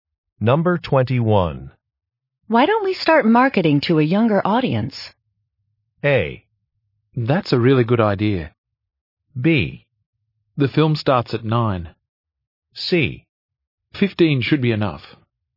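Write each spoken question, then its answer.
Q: Why don't we start marketing to a younger audience?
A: A: That's a really good idea.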